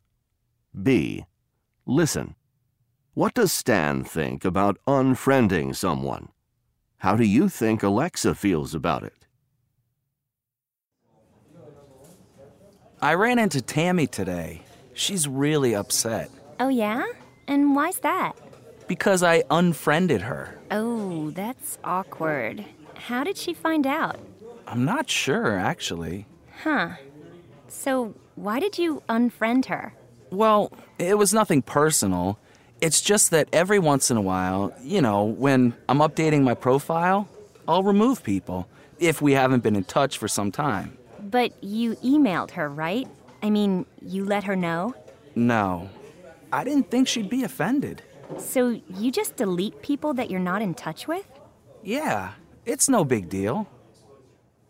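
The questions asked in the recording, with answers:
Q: What does Stan think about unfriending someone?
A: He thinks it's no big deal.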